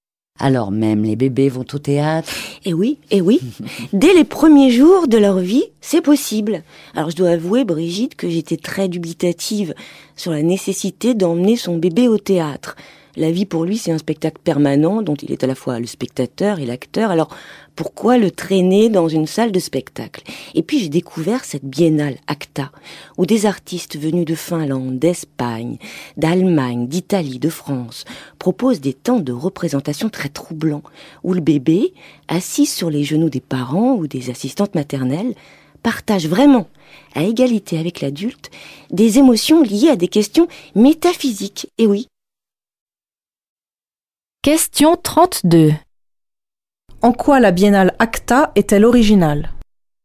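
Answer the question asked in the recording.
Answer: Elle propose des spectacles d'artistes européens où les bébés partagent, à égalité avec les adultes, des émotions liées à des questions métaphysiques.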